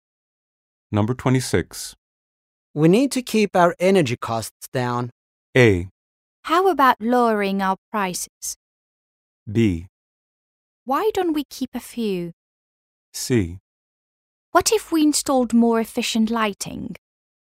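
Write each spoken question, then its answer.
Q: We need to keep our energy costs down.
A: C: What if we installed more efficient lighting?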